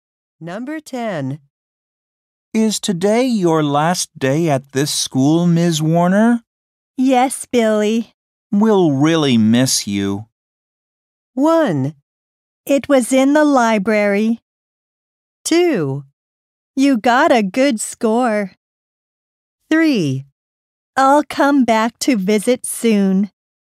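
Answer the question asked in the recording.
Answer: 3: I'll come back to visit soon.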